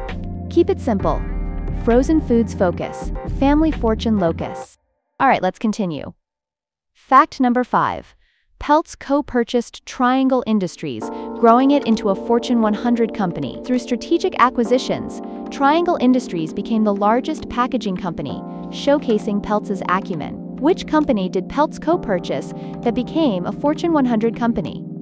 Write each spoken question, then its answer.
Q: Which company did Peltz co-purchase that became a Fortune 100 company?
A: Correct answer, Triangle Industries.